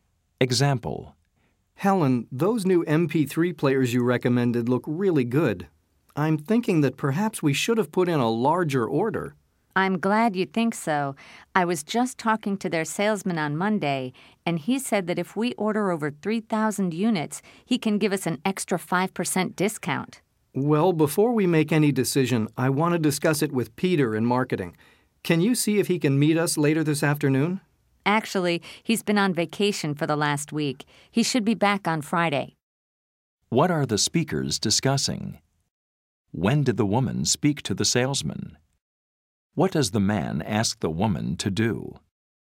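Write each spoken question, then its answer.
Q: What are the speakers discussing?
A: Placing a larger order for the new MP3 players

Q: When did the woman speak to the salesman?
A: On Monday

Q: What does the man ask the woman to do?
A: See if Peter from marketing can meet them later this afternoon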